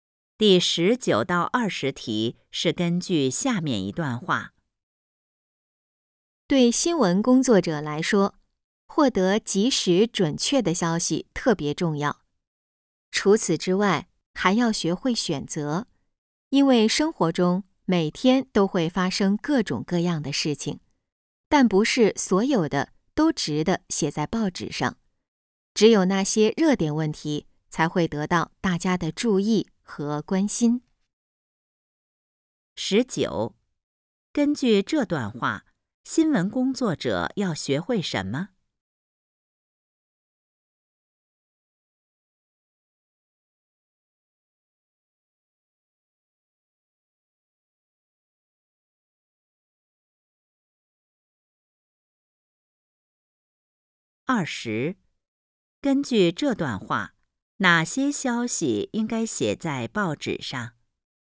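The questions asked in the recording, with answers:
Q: 十九,根据这段话,新闻工作者要学会什么?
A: 学会选择

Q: 二十,根据这段话,哪些消息应该写在报纸上?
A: 热点问题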